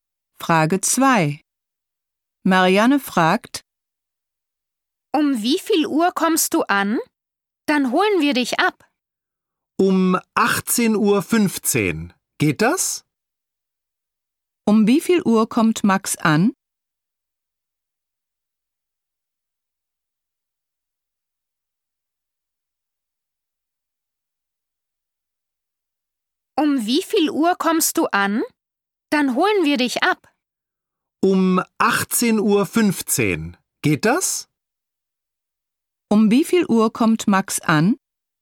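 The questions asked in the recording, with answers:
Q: Um wie viel Uhr kommt Max an?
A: Um 18.15 Uhr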